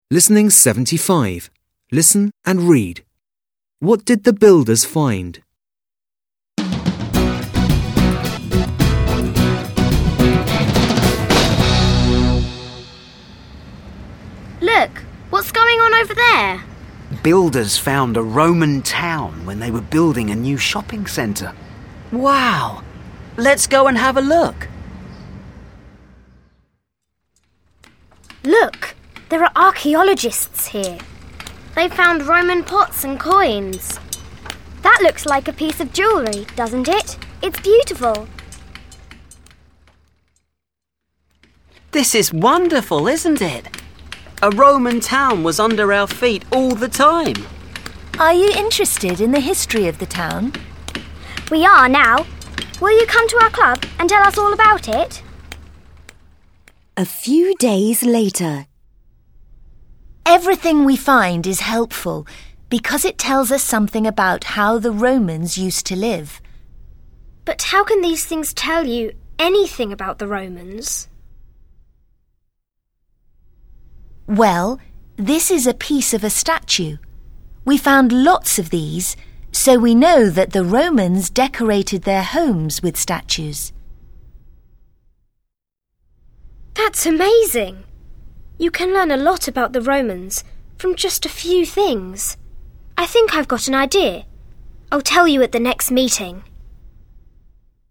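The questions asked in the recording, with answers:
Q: What did the builders find?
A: A Roman town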